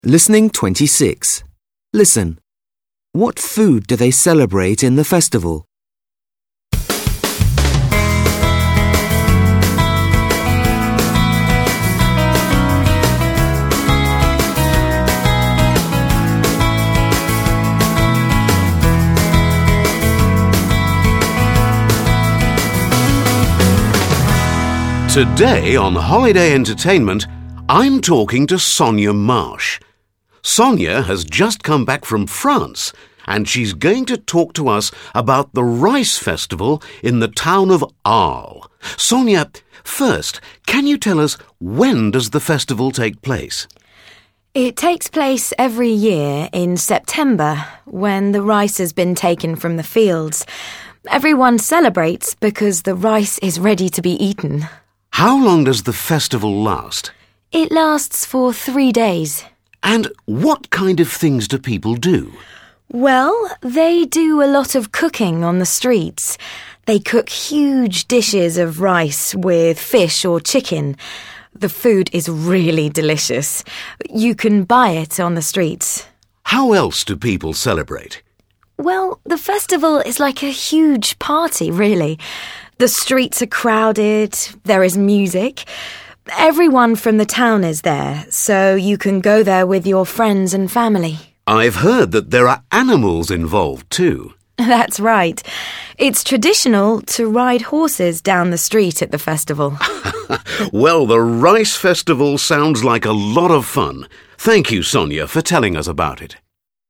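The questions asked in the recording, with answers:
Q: What food do they celebrate in the festival?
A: Rice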